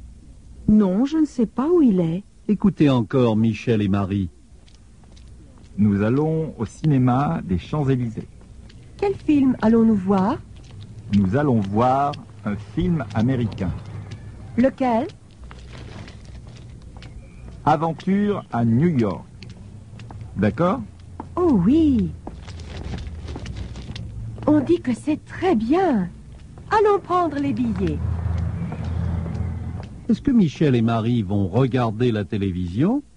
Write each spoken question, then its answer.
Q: Est-ce que Michel et Marie vont regarder la télévision?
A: Non. Ils ne vont pas regarder la télévision.